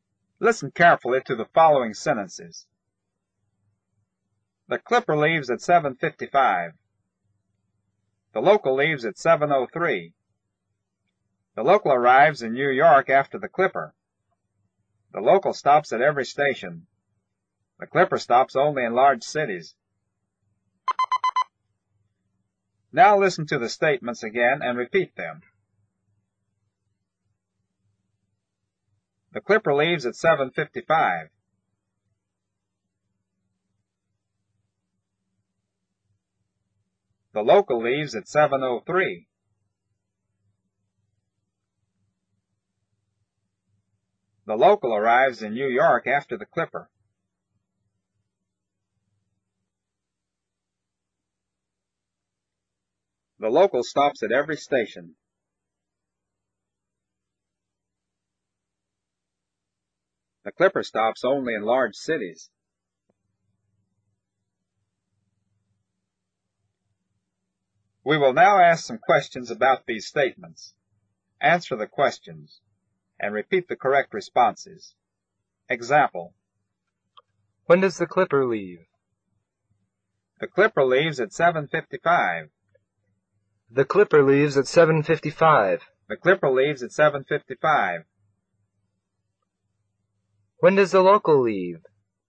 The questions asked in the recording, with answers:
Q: When does the local leave?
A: The local leaves at 7:03.